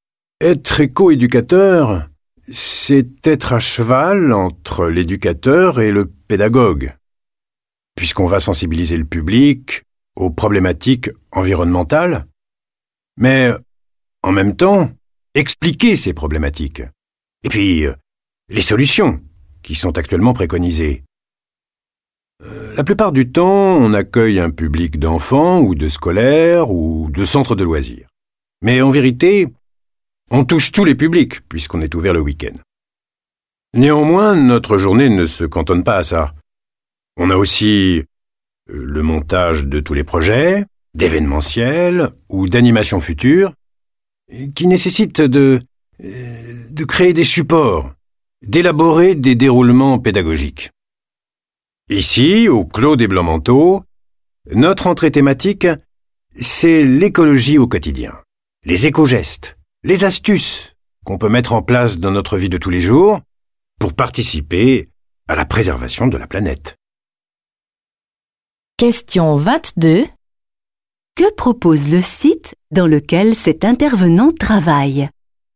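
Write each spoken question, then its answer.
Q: Que propose le site dans lequel cet intervenant travaille ?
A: Une sensibilisation à l'écologie au quotidien : les éco-gestes et astuces pour préserver la planète dans la vie de tous les jours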